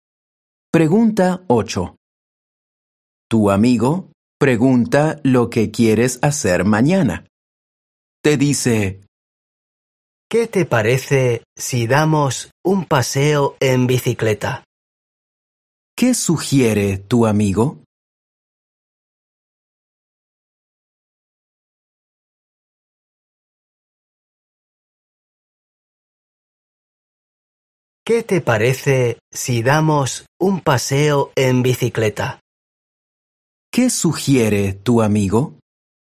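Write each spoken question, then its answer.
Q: ¿Qué sugiere tu amigo?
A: Dar un paseo en bicicleta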